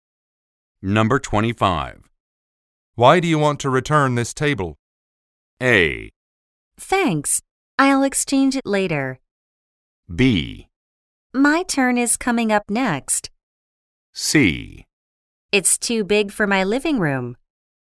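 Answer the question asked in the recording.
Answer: C: It's too big for my living room.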